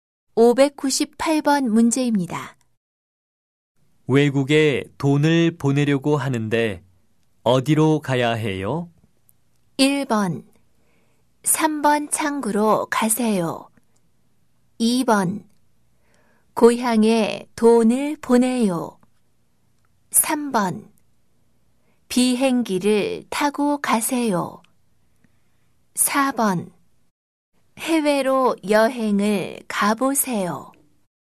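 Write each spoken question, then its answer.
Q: 외국에 돈을 보내려고 하는데 어디로 가야 해요?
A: 1: 3번 창구로 가세요.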